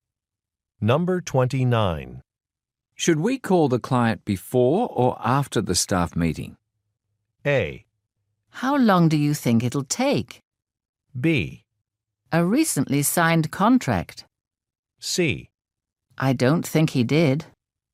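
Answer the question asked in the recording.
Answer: A: How long do you think it'll take?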